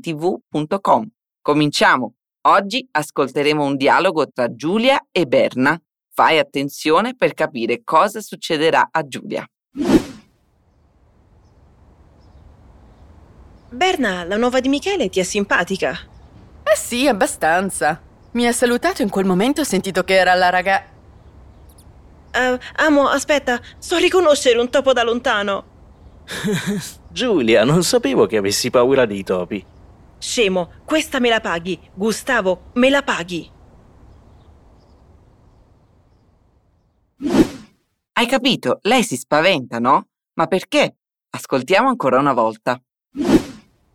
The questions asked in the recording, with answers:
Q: Ma perché?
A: Giulia vede un topo e si spaventa